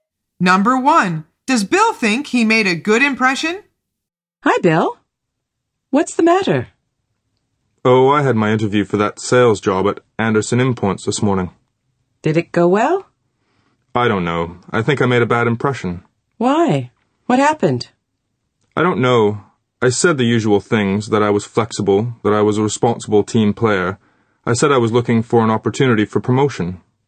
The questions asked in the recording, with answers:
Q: does Bill think he made a good impression?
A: The answer is false. He says, I think I made a bad impression.